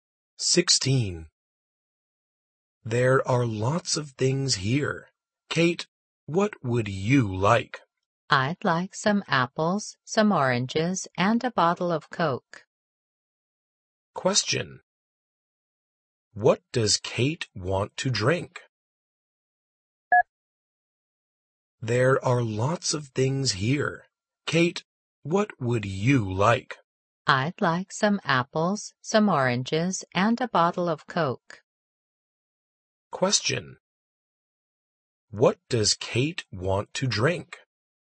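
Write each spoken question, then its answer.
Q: What does Kate want to drink?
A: Coke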